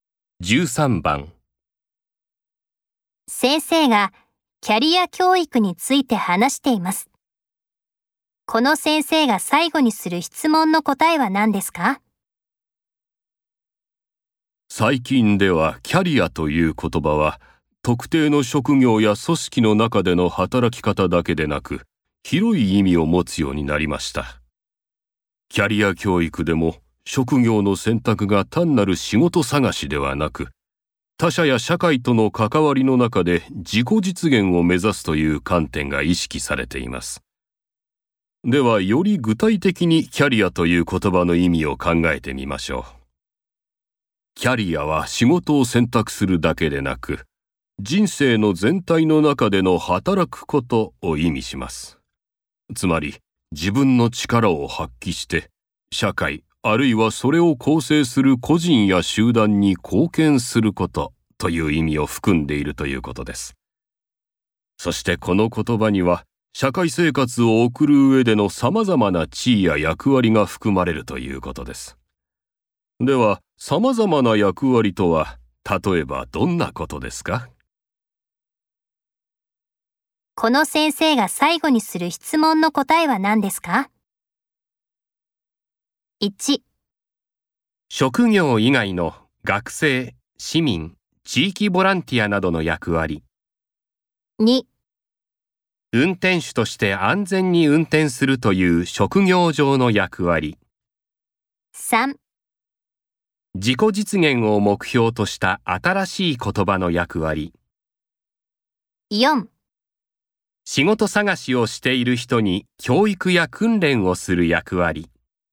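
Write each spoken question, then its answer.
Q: この先生が最後にする質問の答えは何ですか?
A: 1: 職業以外の学生、市民、地域ボランティアなどの役割。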